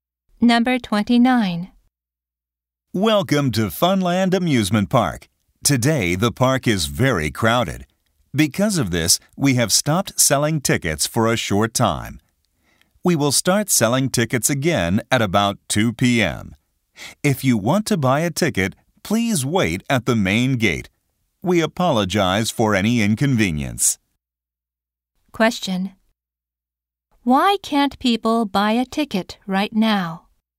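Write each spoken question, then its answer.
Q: Question. Why can't people buy a ticket right now?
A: The park is very crowded.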